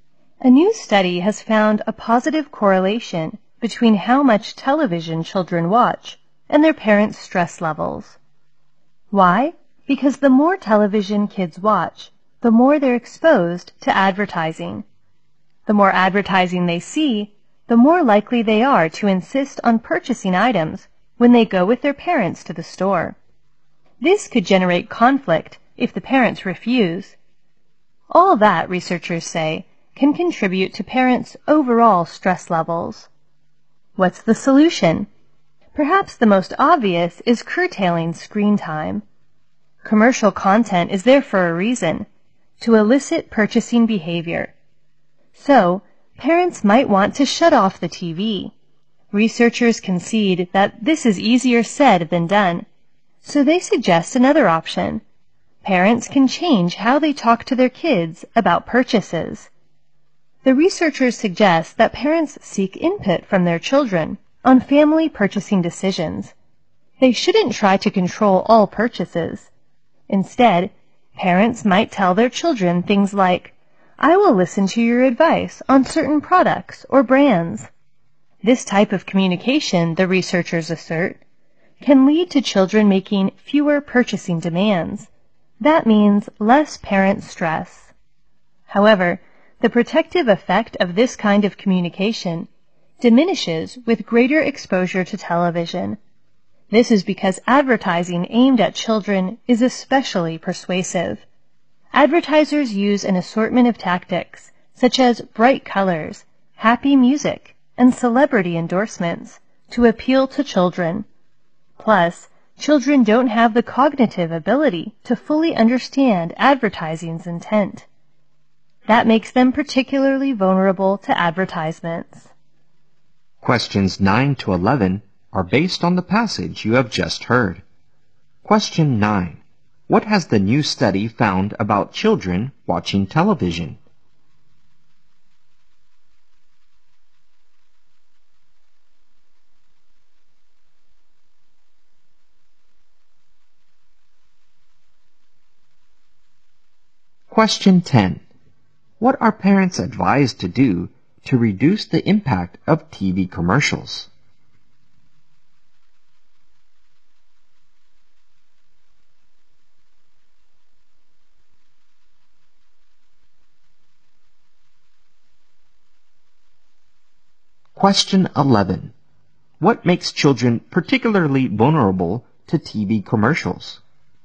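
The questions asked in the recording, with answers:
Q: What has the new study found about children watching television?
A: The more TV children watch, the more stressed their parents are.

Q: What are parents advised to do to reduce the impact of TV commercials?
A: Ask their children for input on family purchasing decisions.

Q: What makes children particularly vulnerable to TV commercials?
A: They can't fully understand the intent of advertising.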